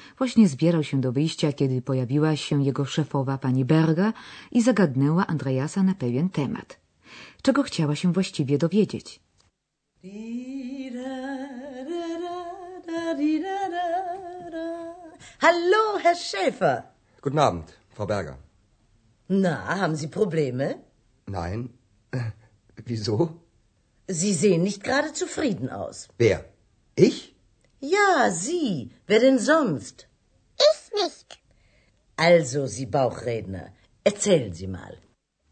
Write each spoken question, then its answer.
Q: Czego chciała się właściwie dowiedzieć?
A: Otóż pani Berga zapytała mimochodem Andreasa, czy może ma jakieś problemy.